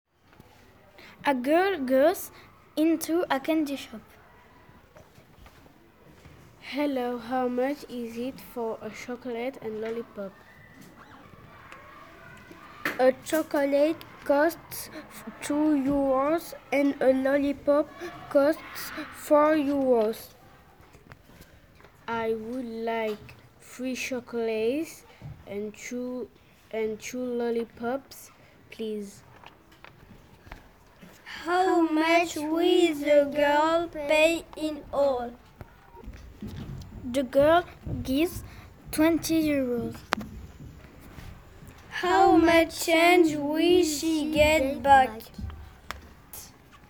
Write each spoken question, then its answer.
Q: How much will the girl pay in all?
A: The girl will pay 14 euros.

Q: How much change will she get back?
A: She will get back 6 euros.